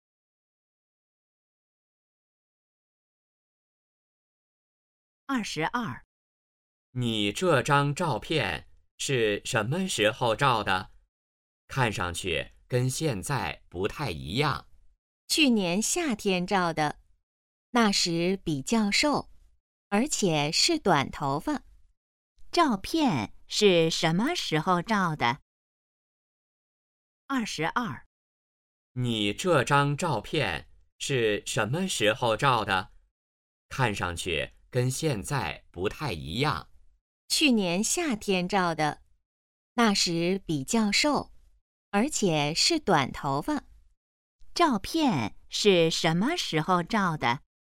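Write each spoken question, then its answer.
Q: 照片是什么时候照的?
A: 去年夏天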